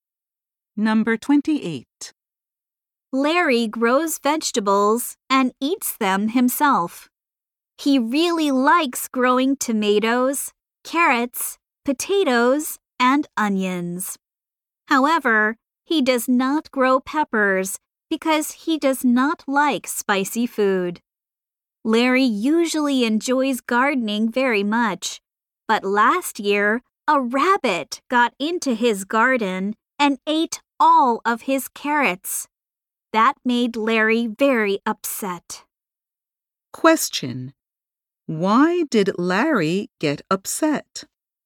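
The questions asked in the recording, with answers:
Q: Why did Larry get upset?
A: A rabbit ate all of his carrots.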